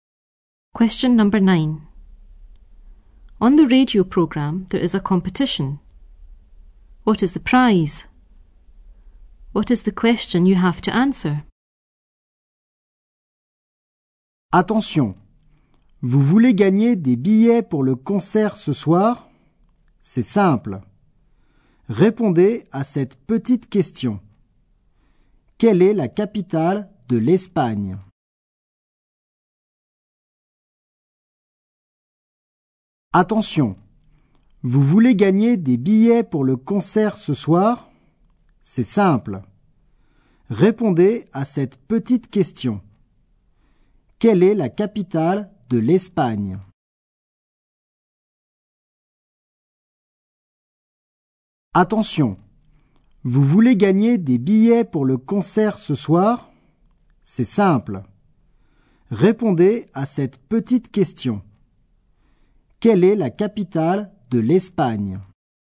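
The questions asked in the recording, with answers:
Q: What is the prize?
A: Tickets for the concert tonight

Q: What is the question you have to answer?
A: What is the capital of Spain?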